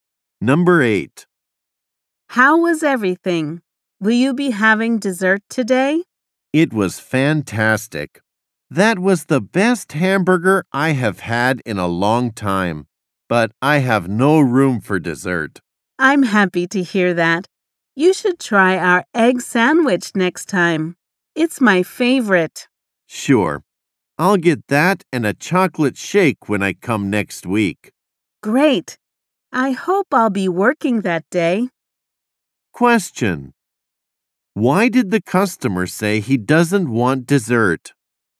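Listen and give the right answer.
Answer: He is full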